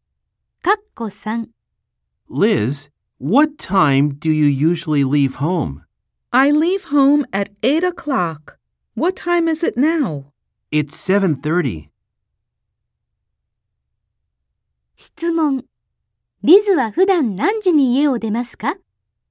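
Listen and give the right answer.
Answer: 8時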